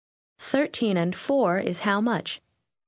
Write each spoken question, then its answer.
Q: 13 and 4 is how much?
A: 17.